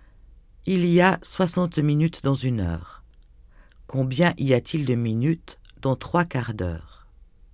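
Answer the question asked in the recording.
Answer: 45 minutes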